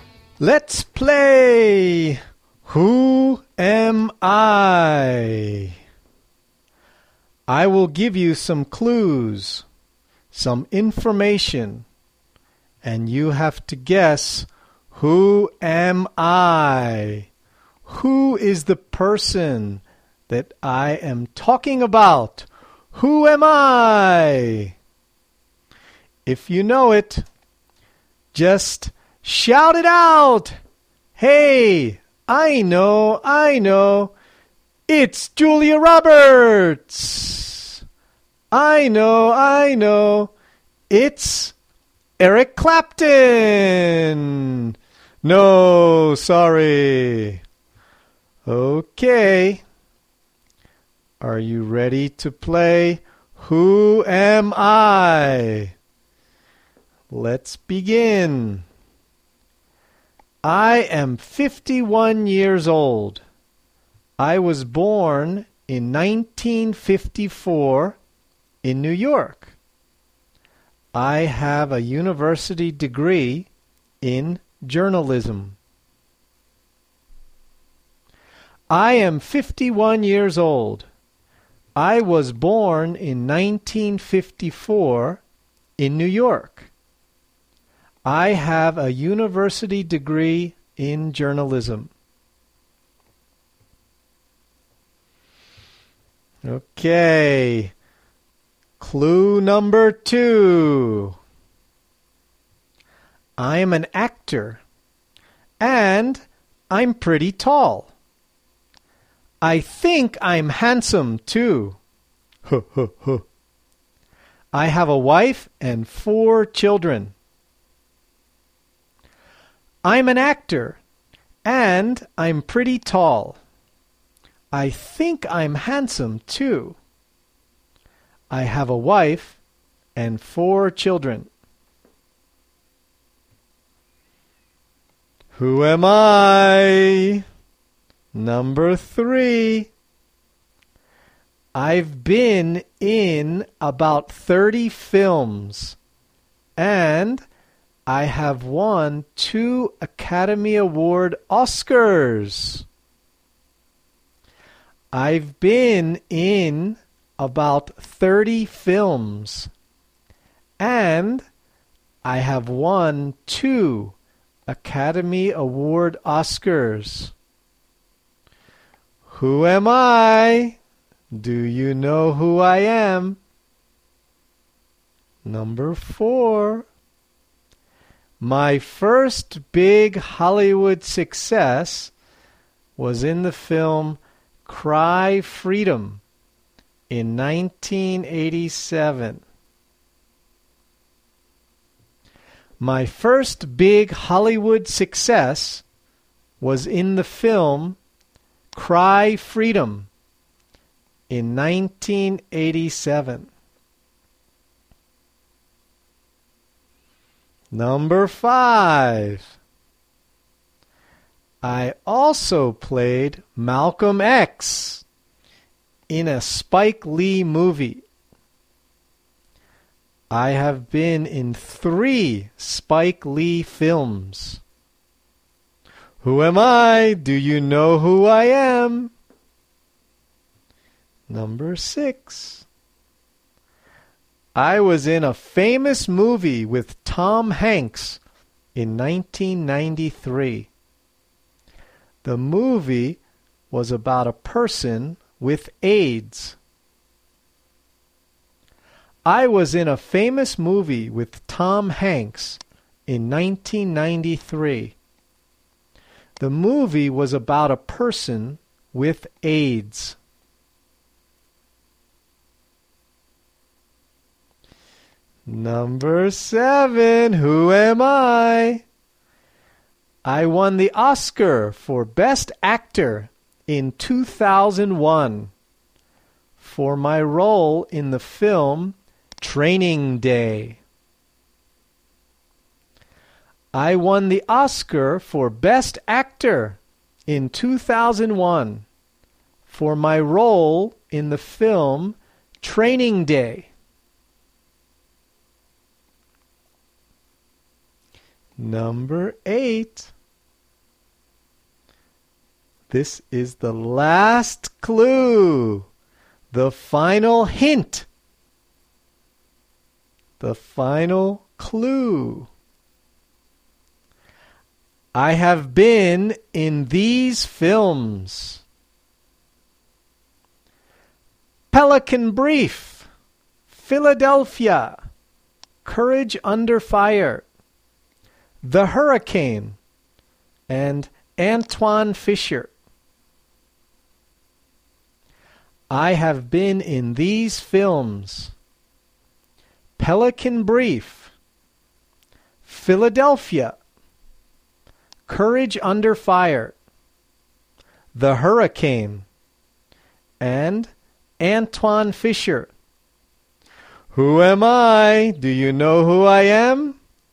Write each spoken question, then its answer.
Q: Who am I? Do you know who I am?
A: Yes! I'm Denzel Washington.